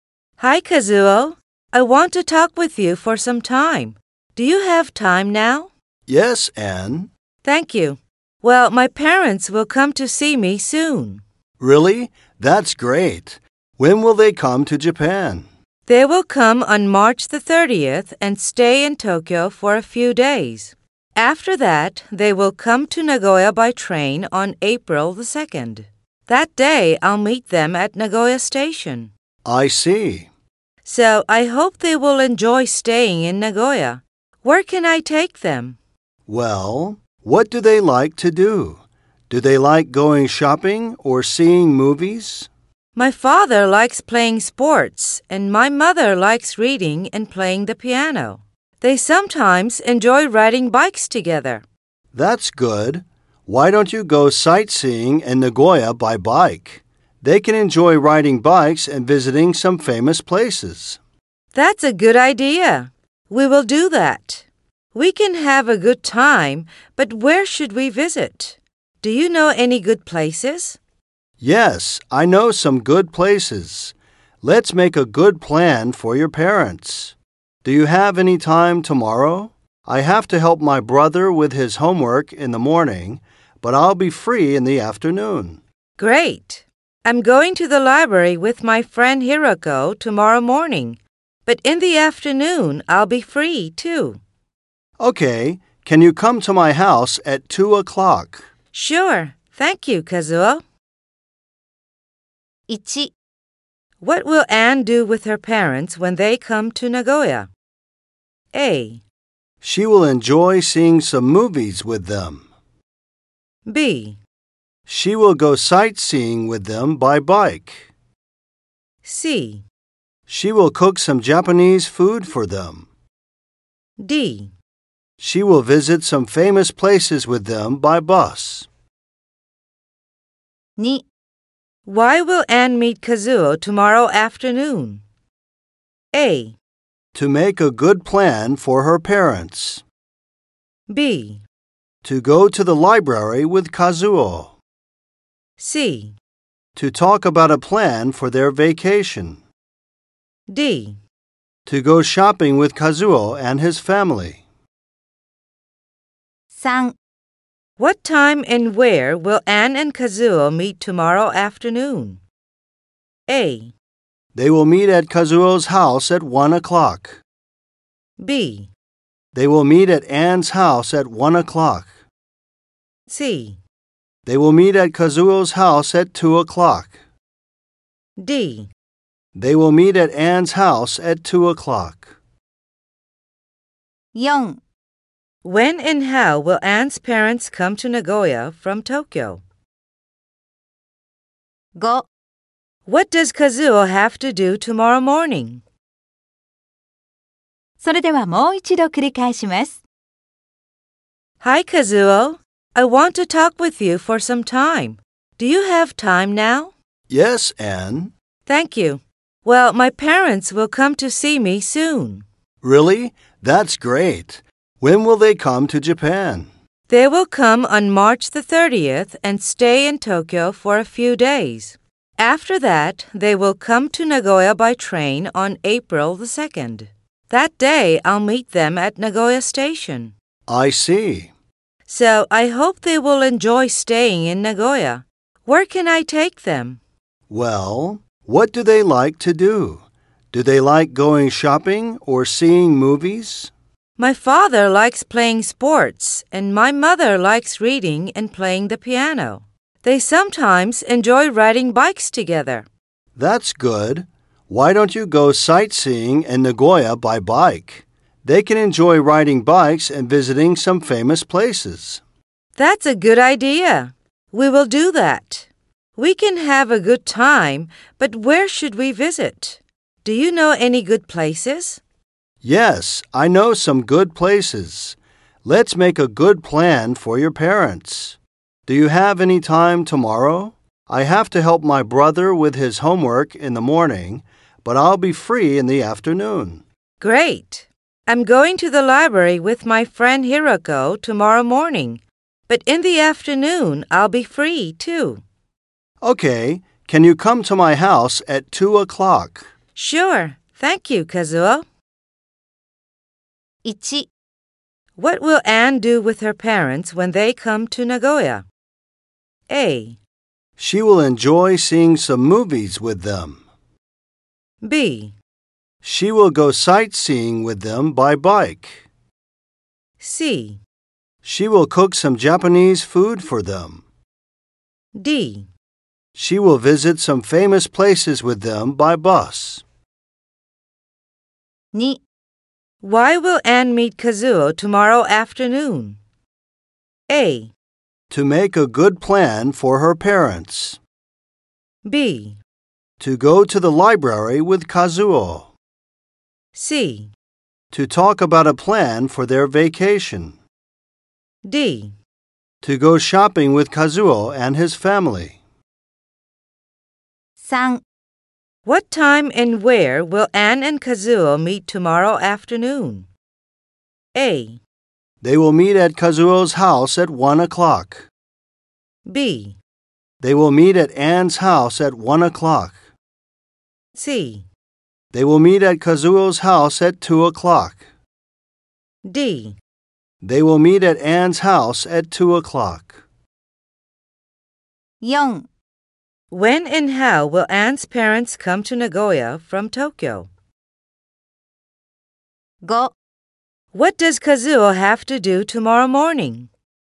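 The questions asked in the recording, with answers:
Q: What will Anne do with her parents when they come to Nagoya?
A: B: She will go sightseeing with them by bike.

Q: Why will Anne meet Kazuo tomorrow afternoon?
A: A: To make a good plan for her parents.

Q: What time and where will Anne and Kazuo meet tomorrow afternoon?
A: C: They will meet at Kazuo's house at 2 o'clock.

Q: When and how will Anne's parents come to Nagoya from Tokyo?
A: On April 2nd, by train.

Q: What does Kazuo have to do tomorrow morning?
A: Help his brother with his homework.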